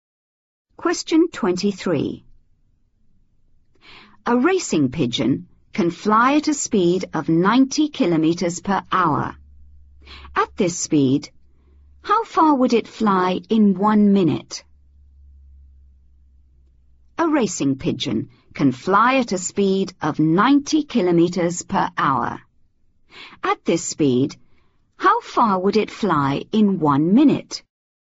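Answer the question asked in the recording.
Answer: 1.5 km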